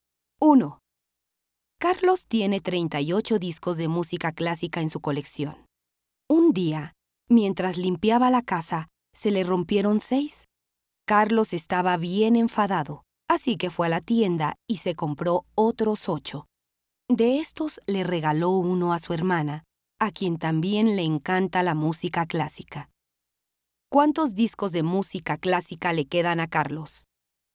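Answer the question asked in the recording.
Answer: Le quedan 39 discos.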